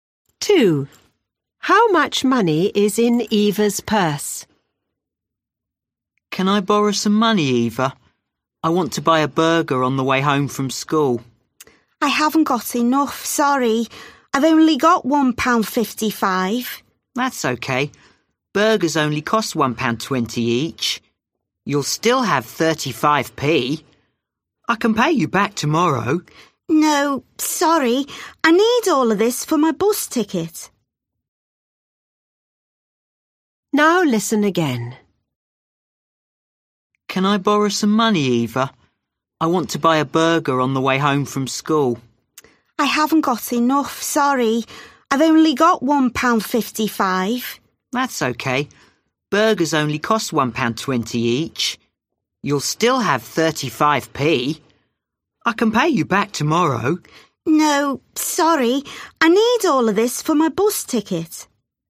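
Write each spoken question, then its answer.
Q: How much money is in Eva's purse?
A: £1.55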